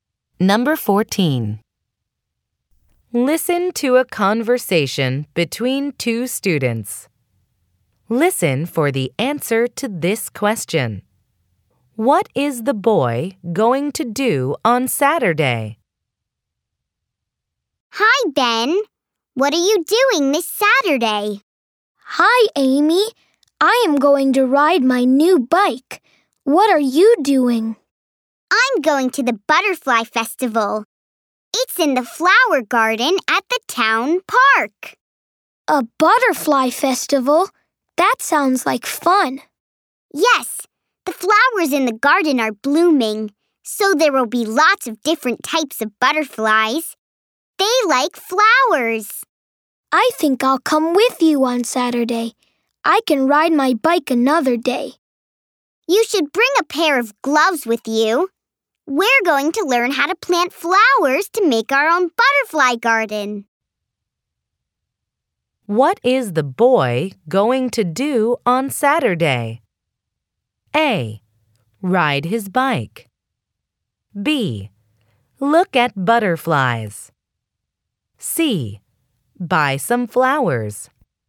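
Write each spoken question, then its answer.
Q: What is the boy going to do on Saturday?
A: B: Look at butterflies.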